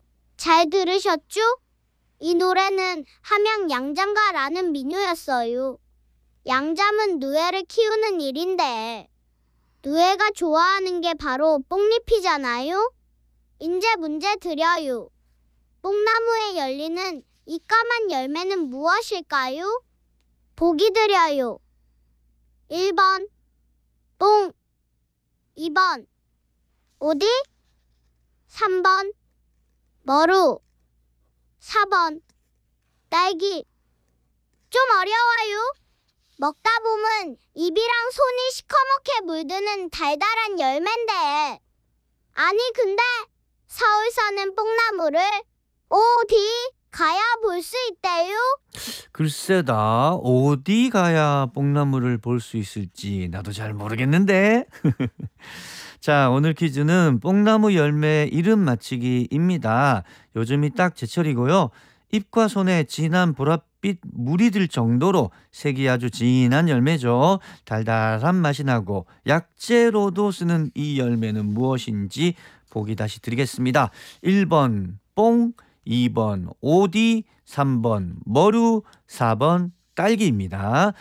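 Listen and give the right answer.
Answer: 2번: 오디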